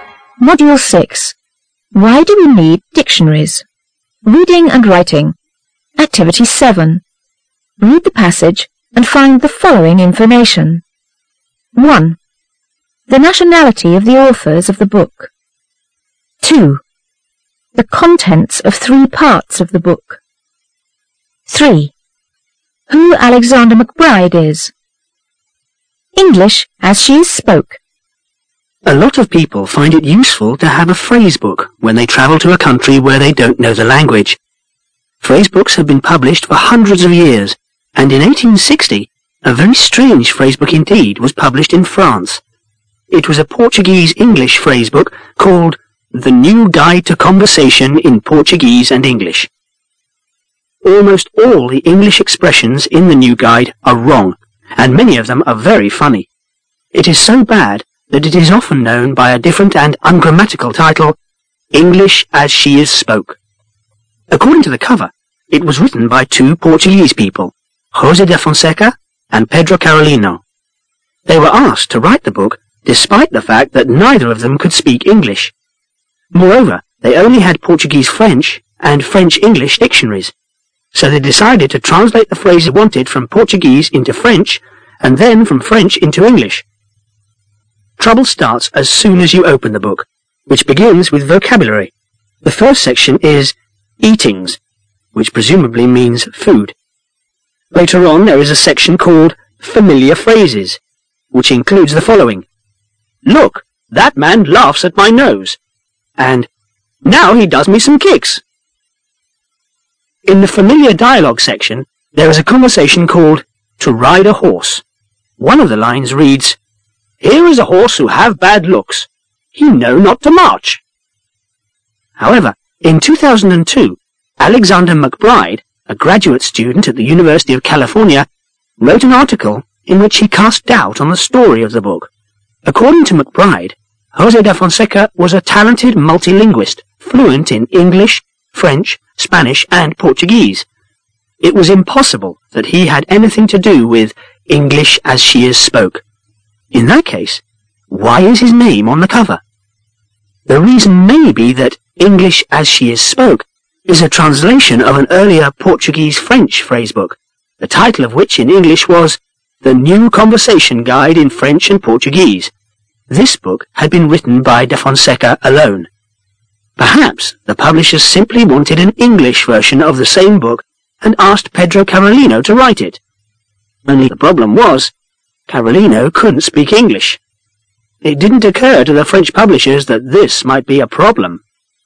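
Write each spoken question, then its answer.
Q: The nationality of the authors of the book.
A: Portuguese

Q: The contents of three parts of the book.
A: Eatings (food vocabulary), familiar phrases, familiar dialogue

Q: Who Alexander McBride is.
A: A graduate student at the University of California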